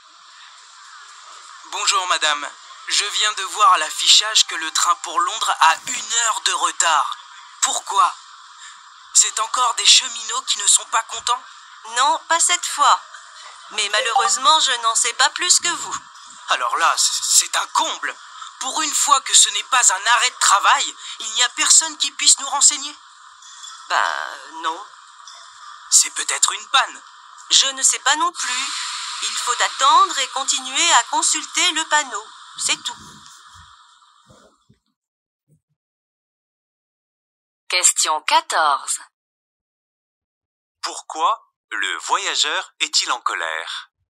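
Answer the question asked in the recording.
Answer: Parce que son train pour Londres a une heure de retard et que personne ne peut lui en expliquer la raison.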